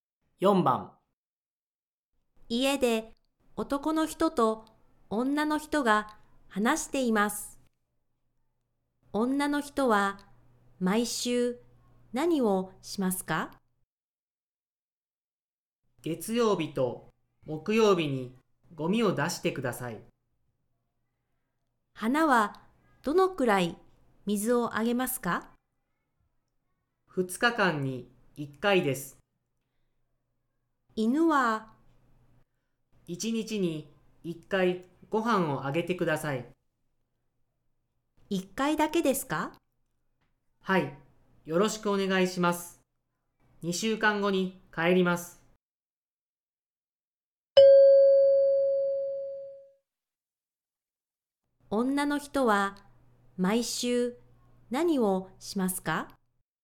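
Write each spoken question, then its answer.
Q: 女の人は毎週何をしますか?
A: 月曜日と木曜日にゴミを出す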